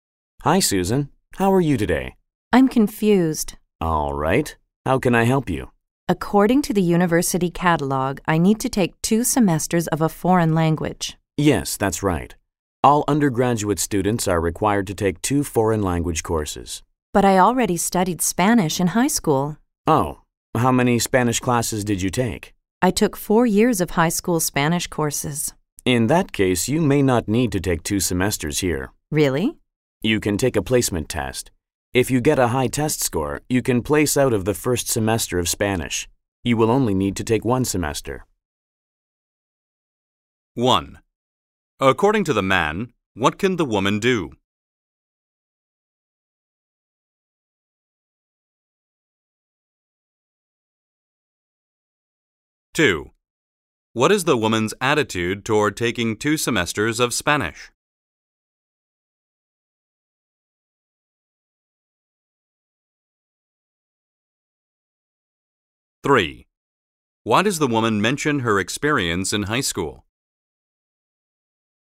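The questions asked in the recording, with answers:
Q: According to the man, what can the woman do?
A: Take a placement test to place out of the first semester of Spanish

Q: Why does the woman mention her experience in high school?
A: She already studied Spanish for 4 years, so she may not need 2 semesters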